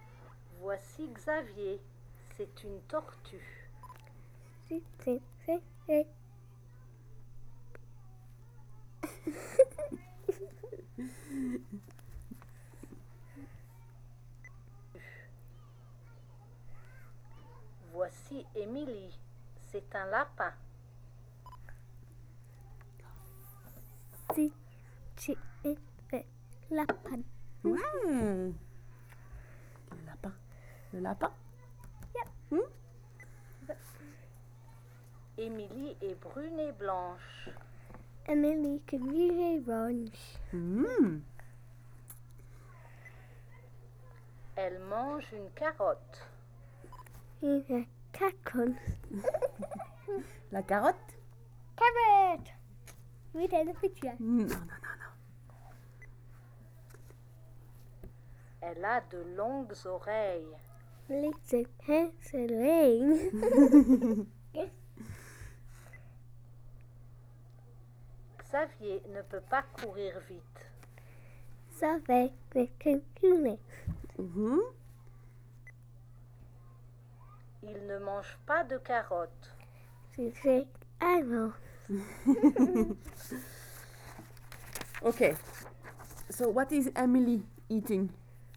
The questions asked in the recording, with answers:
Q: So what is Emily eating?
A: Carrot.